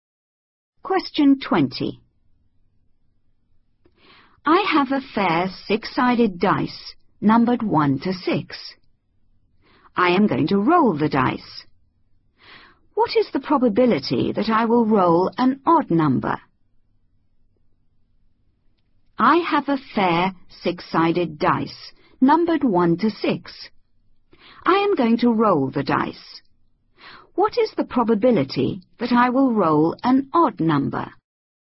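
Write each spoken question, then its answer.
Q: What is the probability that I will roll an odd number?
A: 1/2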